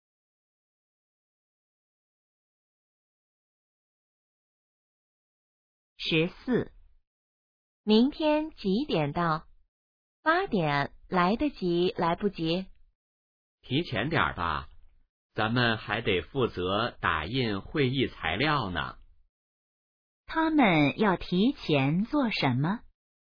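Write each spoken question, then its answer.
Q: 他们要提前做什么?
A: 打印会议材料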